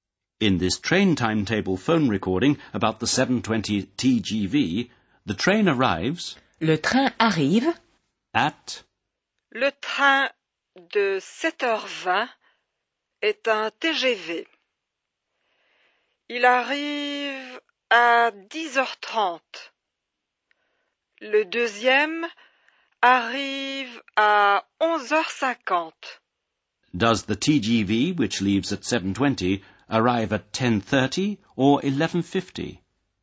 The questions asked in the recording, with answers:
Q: Does the TGV, which leaves at 7:20, arrive at 10:30 or 11:50?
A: The train arrives at 10:30.